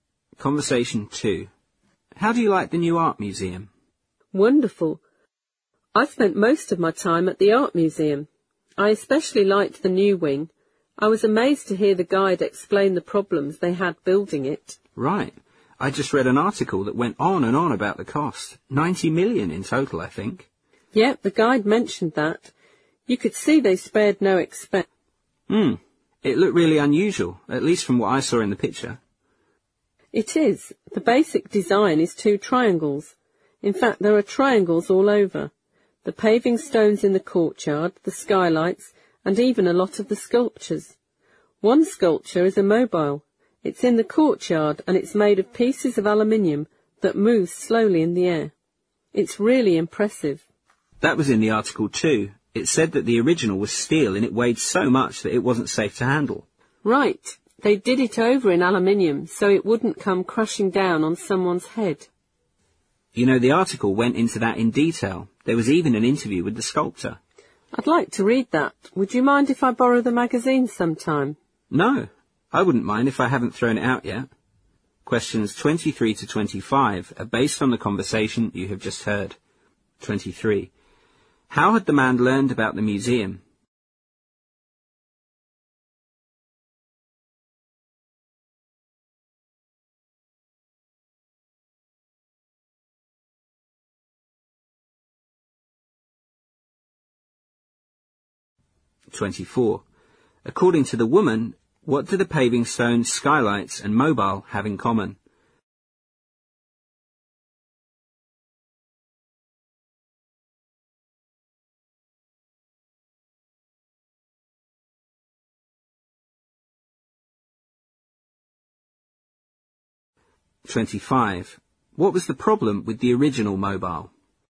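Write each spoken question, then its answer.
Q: How had the man learned about the museum?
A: From a magazine article

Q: According to the woman, what do the paving stones, skylights, and mobile have in common?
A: They are all triangular

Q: What was the problem with the original mobile?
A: It was made of steel and too heavy to be safe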